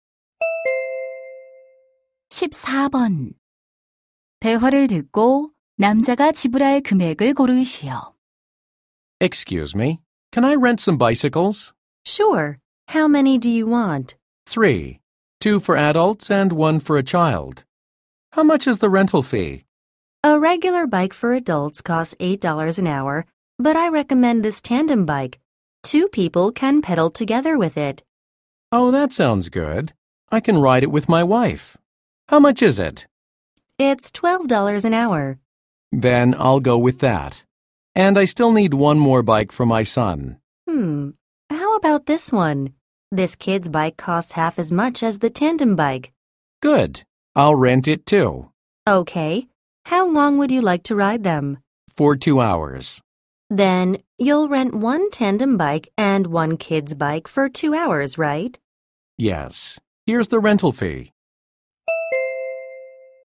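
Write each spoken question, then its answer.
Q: 대화를 듣고 남자가 지불할 금액을 고르시오.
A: 36달러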